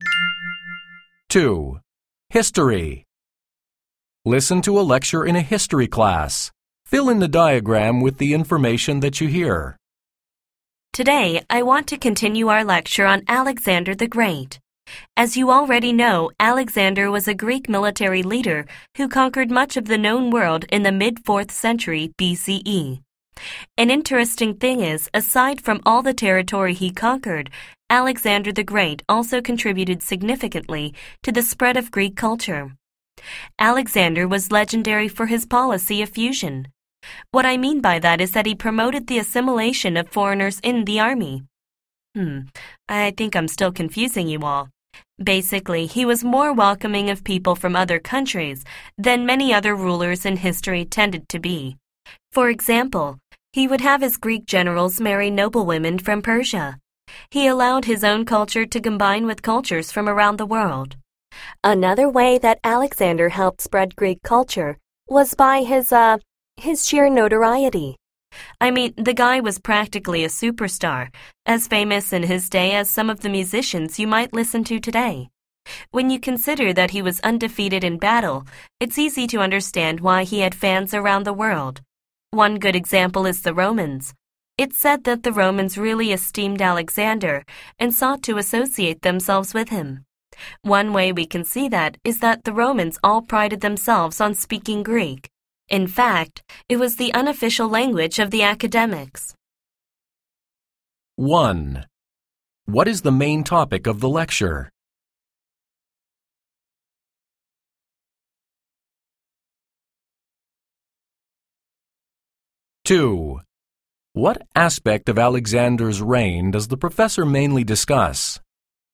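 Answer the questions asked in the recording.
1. How Alexander the Great helped spread Greek culture
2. His contribution to the spread of Greek culture (his policy of fusion and his fame)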